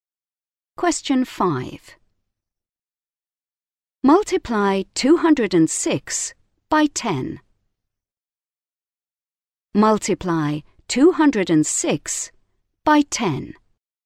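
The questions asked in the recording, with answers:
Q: Multiply 206 by 10.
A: 2060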